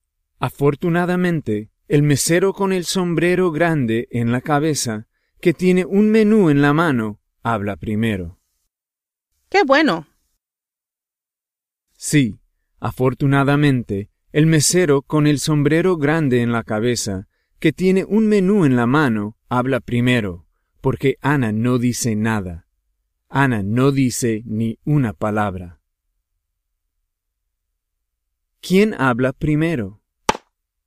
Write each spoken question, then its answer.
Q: ¿Quién habla primero?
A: El mesero habla primero.